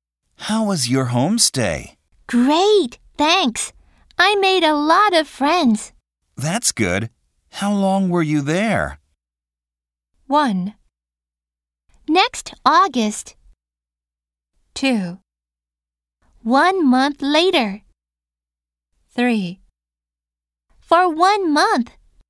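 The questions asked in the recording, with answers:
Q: That's good. How long were you there?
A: 3: For 1 month.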